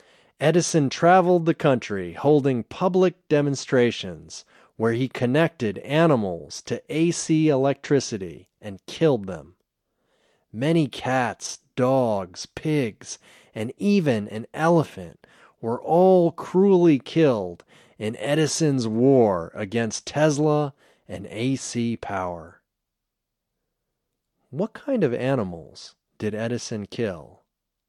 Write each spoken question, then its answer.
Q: What kind of animals did Edison kill?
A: He killed cats, dogs, pigs, and even an elephant.